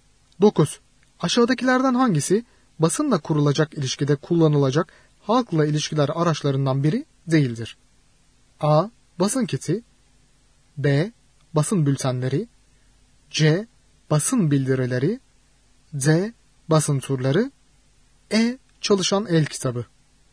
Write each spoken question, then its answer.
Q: Aşağıdakilerden hangisi basınla kurulacak ilişkide kullanılacak halkla ilişkiler araçlarından biri değildir?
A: Doğru yanıt E şıkkı. Çalışan el kitabı.